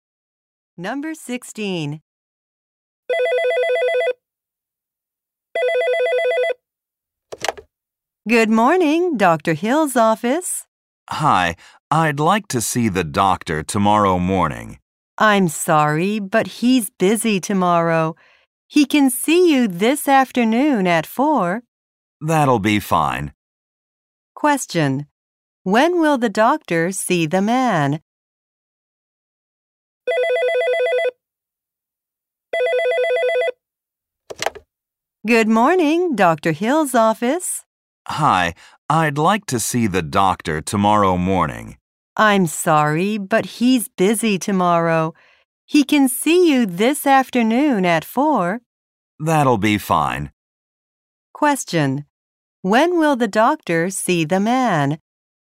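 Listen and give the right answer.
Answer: This afternoon at 4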